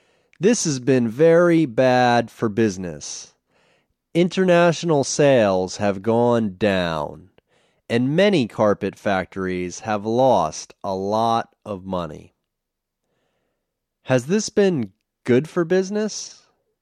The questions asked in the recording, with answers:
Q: Has this been good for business?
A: No, this hasn't been good for business.